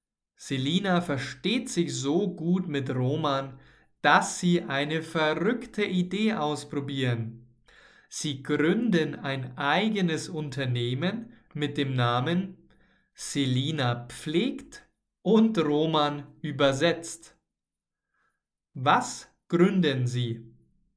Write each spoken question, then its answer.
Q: Was gründen Sie?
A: Ein eigenes Unternehmen. Sie gründen ein eigenes Unternehmen.